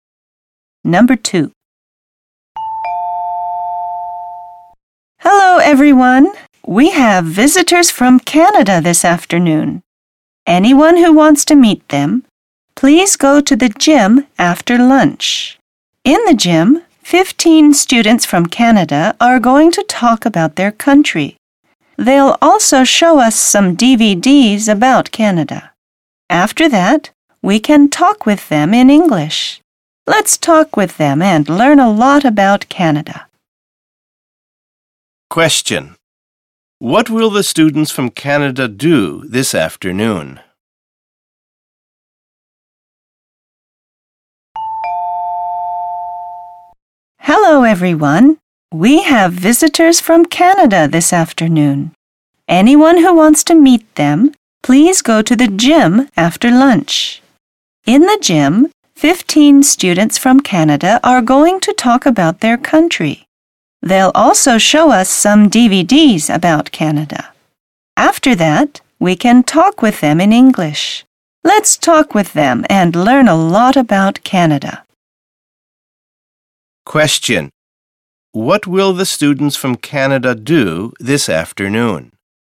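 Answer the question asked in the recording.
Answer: Talk about Canada and show DVDs about it in the gym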